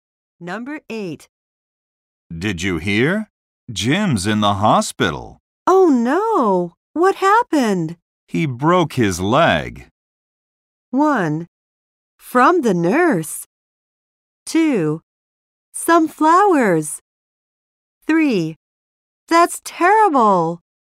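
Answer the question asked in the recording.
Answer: 3: That's terrible.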